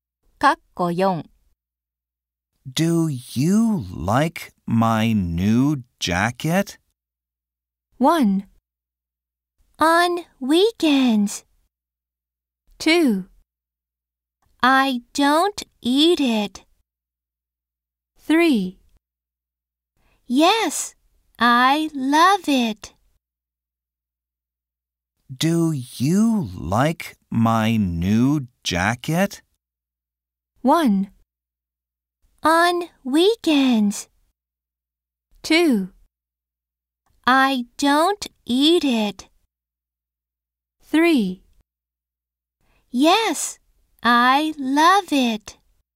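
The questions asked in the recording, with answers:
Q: Do you like my new jacket?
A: 3: Yes, I love it.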